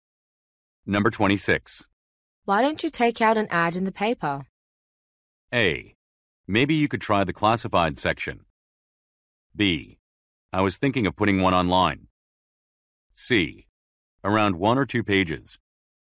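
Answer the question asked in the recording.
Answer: B: I was thinking of putting one online.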